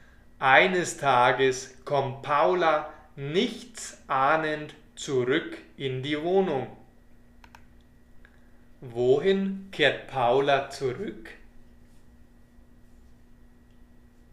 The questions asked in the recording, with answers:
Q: Wohin kehrt Paula zurück?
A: In die Wohnung. Sie kommt in die Wohnung zurück.